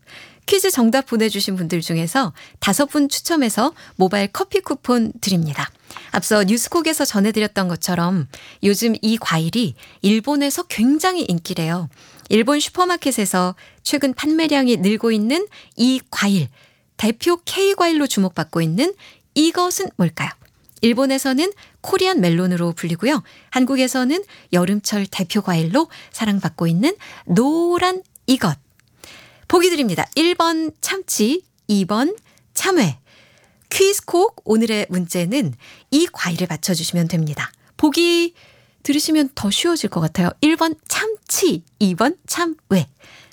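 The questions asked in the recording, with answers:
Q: 일본 슈퍼마켓에서 최근 판매량이 늘고 있는 이 과일, 대표 K과일로 주목받고 있는 이것은 뭘까요?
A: 2번: 참외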